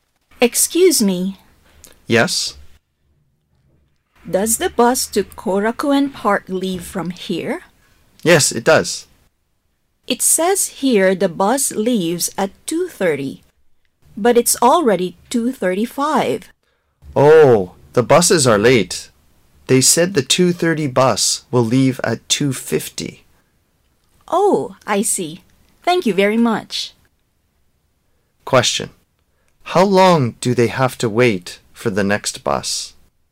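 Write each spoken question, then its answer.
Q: How long do they have to wait for the next bus?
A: 15 minutes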